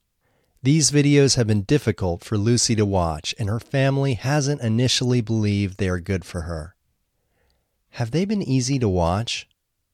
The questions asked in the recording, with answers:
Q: Have they been easy to watch?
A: No, they haven't been easy to watch.